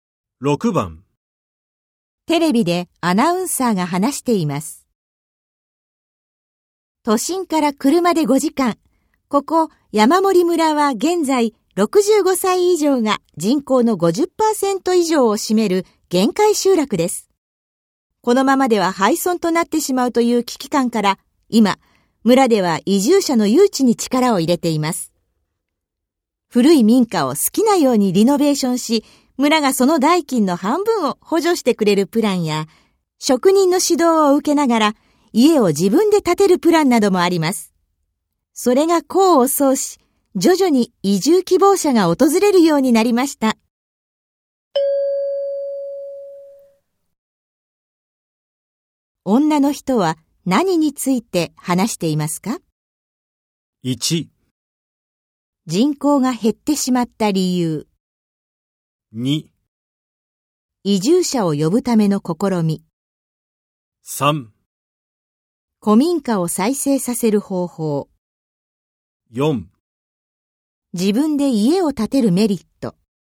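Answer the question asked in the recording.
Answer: 2: 移住者を呼ぶための試み。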